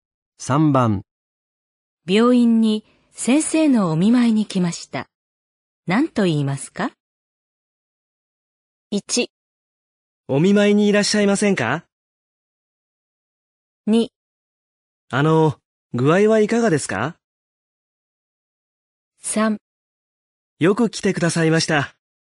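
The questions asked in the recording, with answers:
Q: 病院に先生のお見舞いに来ました。何と言いますか?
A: 2: あの、具合はいかがですか?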